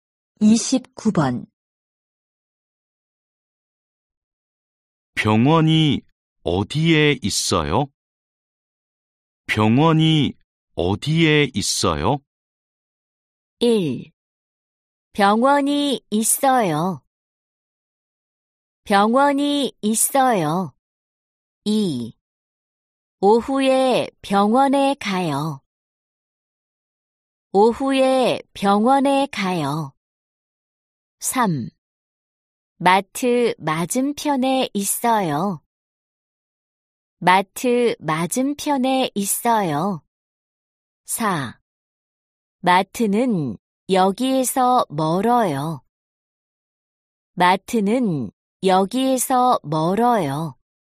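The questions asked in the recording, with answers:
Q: 병원이 어디에 있어요?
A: 3: 마트 맞은편에 있어요.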